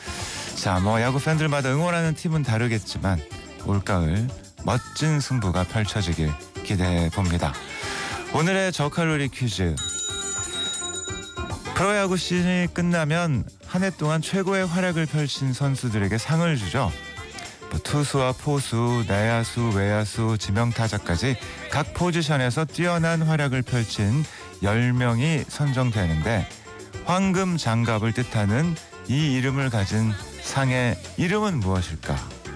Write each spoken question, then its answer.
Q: 뭐 투수와 포수, 내야수, 외야수, 지명타자까지 각 포지션에서 뛰어난 활약을 펼친 10명이 선정되는데 황금 장갑을 뜻하는 이 이름을 가진 상의 이름은 무엇일까?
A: 골든 글러브입니다